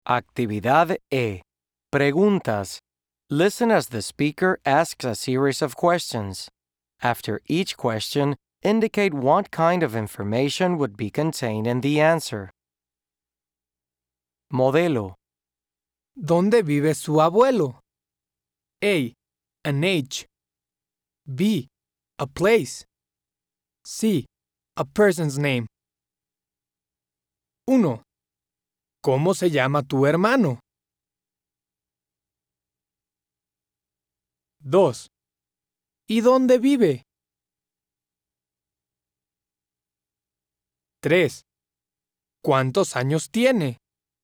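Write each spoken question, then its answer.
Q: ¿Cómo se llama tu hermano?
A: C: A person's name.

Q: ¿Y dónde vive?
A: B: A place.

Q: ¿Cuántos años tiene?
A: A: An age.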